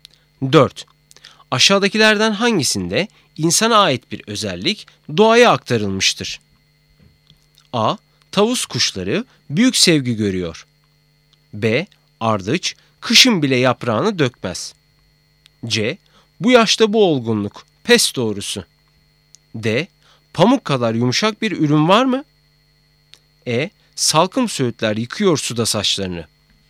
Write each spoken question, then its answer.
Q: Aşağıdakilerden hangisinde insana ait bir özellik doğaya aktarılmıştır?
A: Doğru cevap E. Salkım söğütler yıkıyor suda saçlarını.